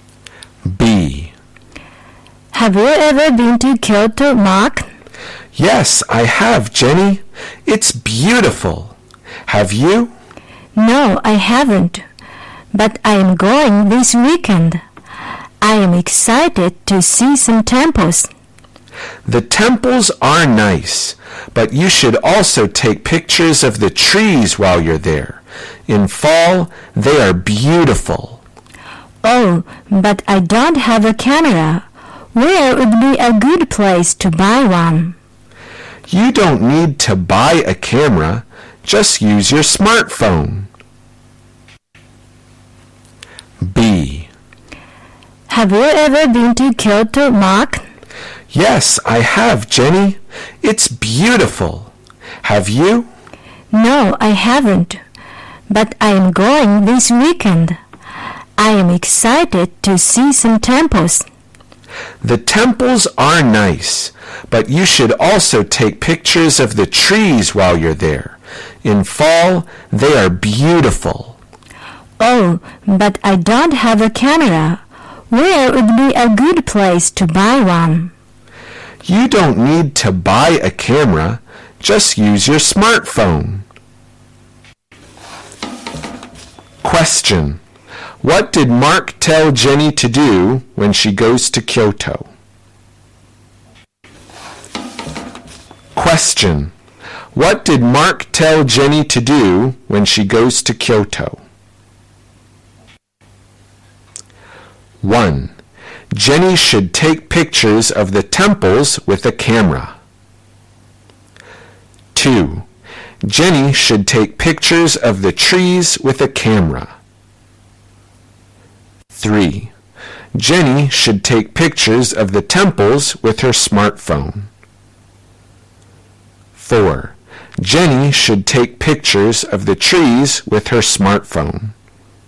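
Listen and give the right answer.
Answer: 4: Jenny should take pictures of the trees with her smartphone.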